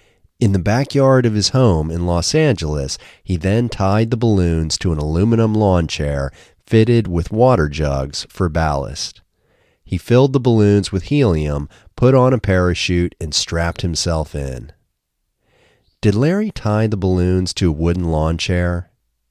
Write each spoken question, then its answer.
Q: Did Larry tie the balloons to a wooden lawn chair?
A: No, he didn't tie them to a wooden lawn chair.